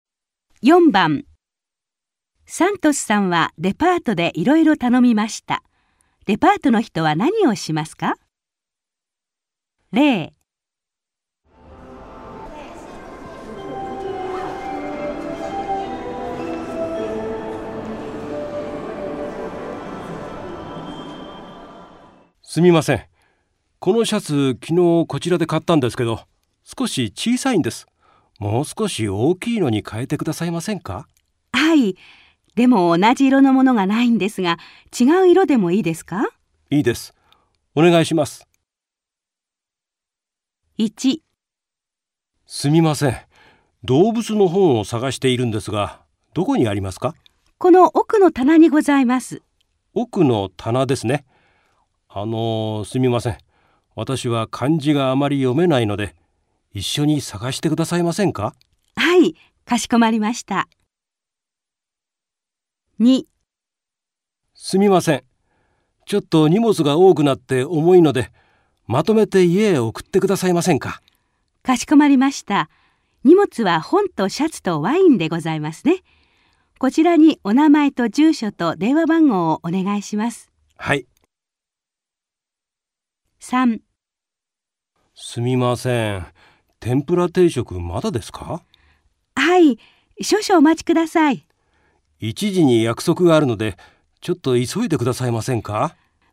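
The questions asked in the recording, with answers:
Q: デパートの人は何をしますか?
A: サントスさんと一緒に動物の本を探す

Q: デパートの人は何をしますか?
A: 荷物をまとめて家へ送る

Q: デパートの人は何をしますか?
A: 天ぷら定食をすぐ持ってくる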